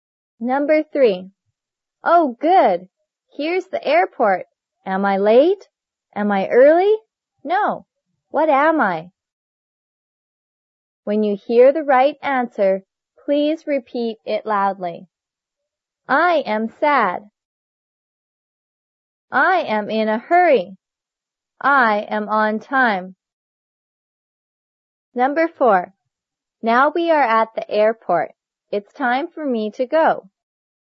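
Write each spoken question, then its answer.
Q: What am I?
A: I am on time.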